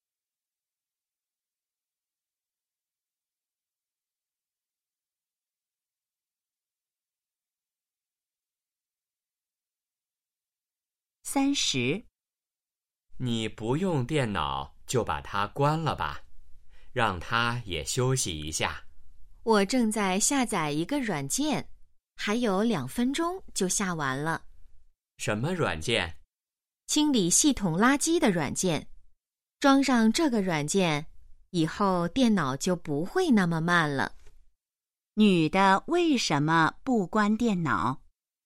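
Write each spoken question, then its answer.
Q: 女的为什么不关电脑?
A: 正在下载软件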